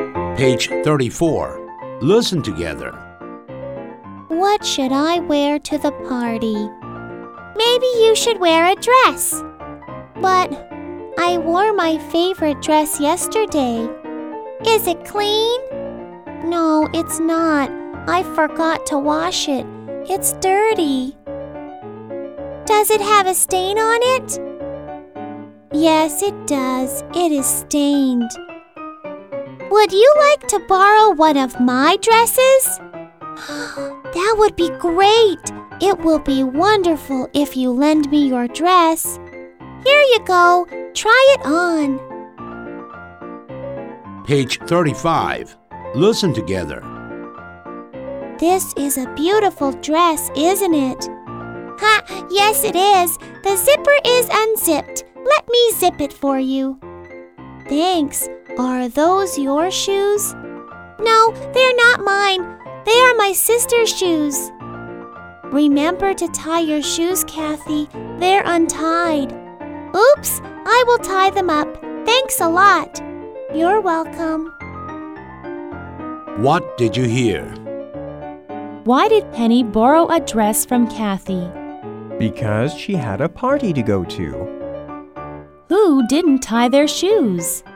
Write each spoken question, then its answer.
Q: Who didn't tie their shoes?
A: Kathy didn't tie her shoes.